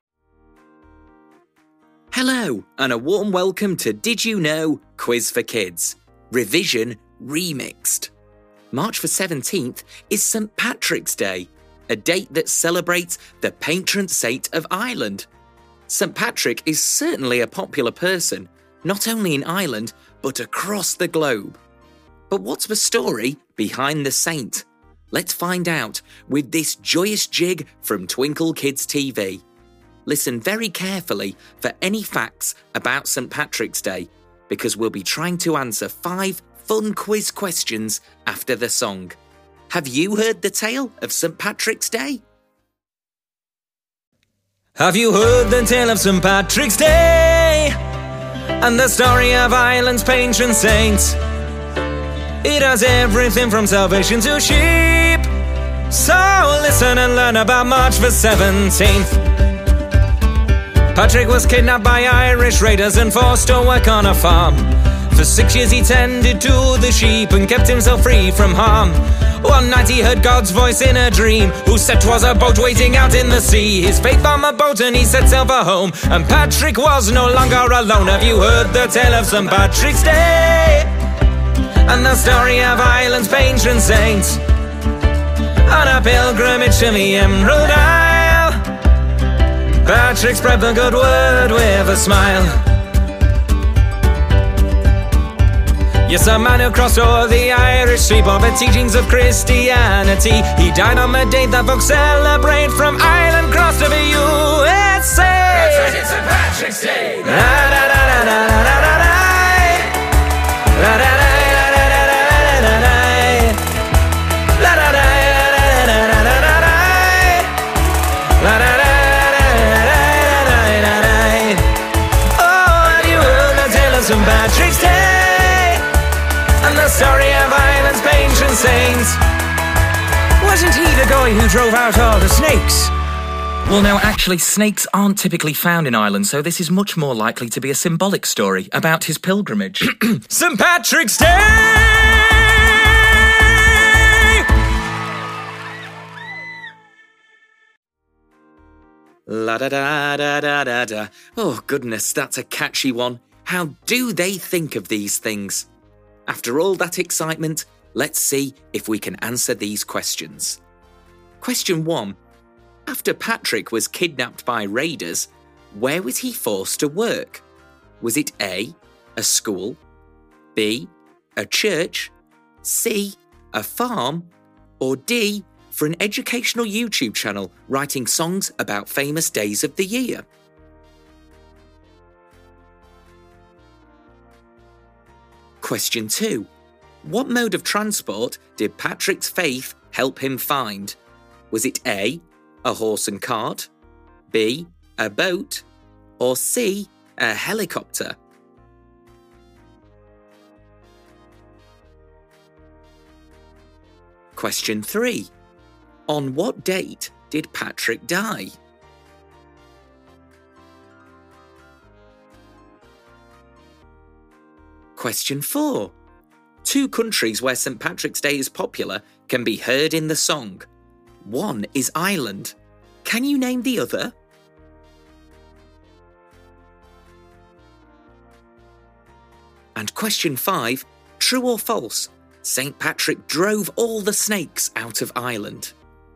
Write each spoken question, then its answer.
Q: After Patrick was kidnapped by raiders, where was he forced to work?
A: So that leaves us with C, a farm.

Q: What mode of transport did Patrick's faith help him find?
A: The answer is B, a boat.

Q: On what date did Patrick die?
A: March the 17th is your answer.

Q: Two countries where St. Patrick's Day is popular can be heard in the song. One is Ireland. Can you name the other?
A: But in our song, the answer you are looking for is the USA.

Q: true or false, St. Patrick drove all the snakes out of Ireland.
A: The answer is false.